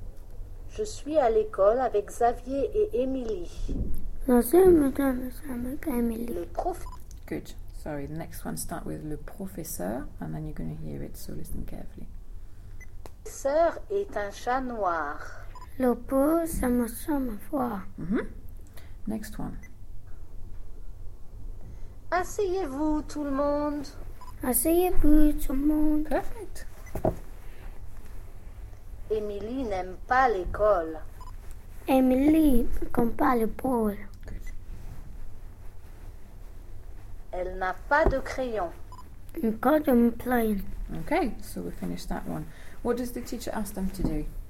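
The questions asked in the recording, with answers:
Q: What does the teacher ask them to do?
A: Sit down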